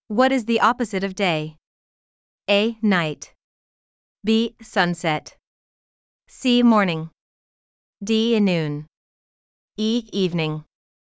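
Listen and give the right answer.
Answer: A: Night.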